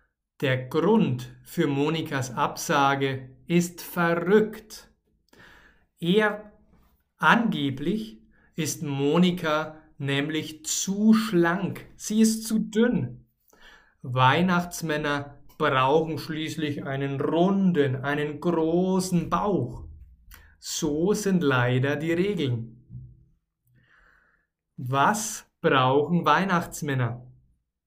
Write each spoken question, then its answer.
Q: Was brauchen Weihnachtsmänner?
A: Einen runden, einen großen Bauch.